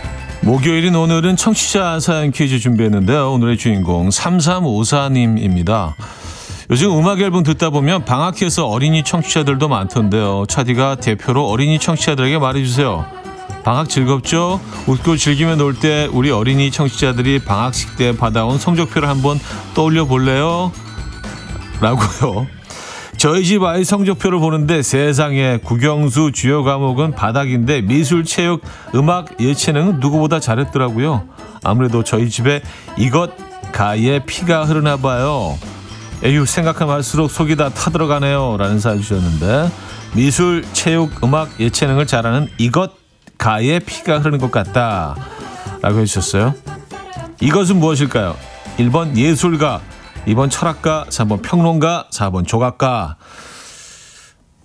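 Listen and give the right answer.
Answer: 1번: 예술가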